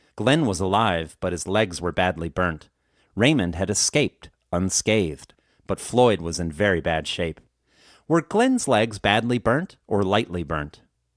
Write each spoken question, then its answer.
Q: Were Glenn's legs badly burnt or lightly burnt?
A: Glenn's legs were badly burnt.